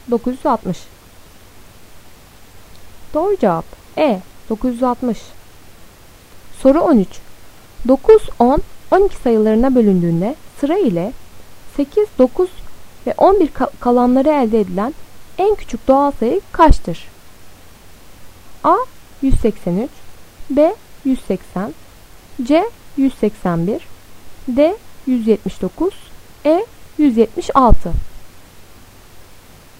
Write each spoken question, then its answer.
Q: 9, 10, 12 sayılarına bölündüğünde sıra ile 8, 9 ve 11 kalanları elde edilen en küçük doğal sayı kaçtır?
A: Doğru cevap D. 179.